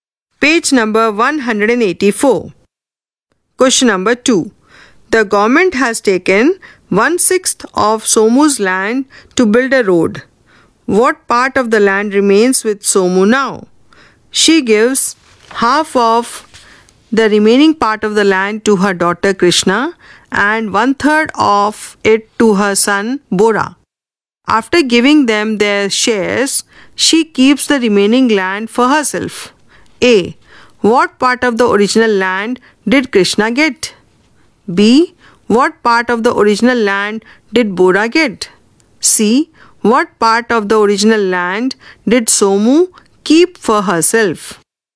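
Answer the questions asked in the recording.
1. 5/6
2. 5/12
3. 5/18
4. 5/36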